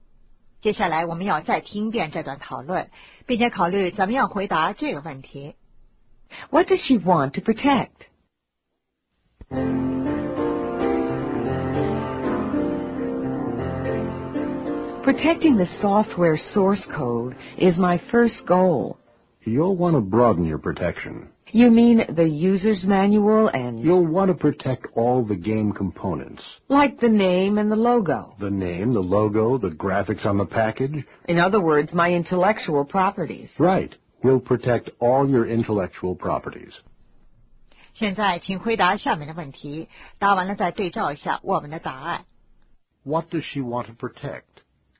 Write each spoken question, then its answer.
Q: What does she want to protect?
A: All the game components, her intellectual properties.